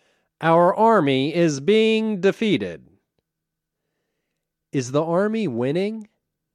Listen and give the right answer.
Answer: No, the army isn't winning.